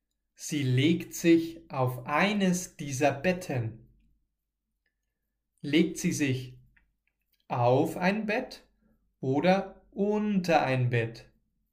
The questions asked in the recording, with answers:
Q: Legt sie sich auf ein Bett oder unter ein Bett?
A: Auf ein Bett. Susanne legt sich auf ein Bett.